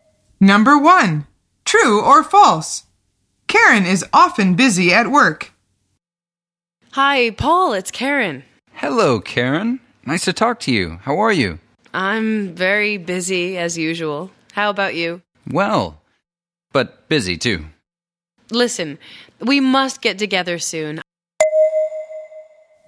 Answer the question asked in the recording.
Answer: The answer is true. She says, I'm very busy, as usual.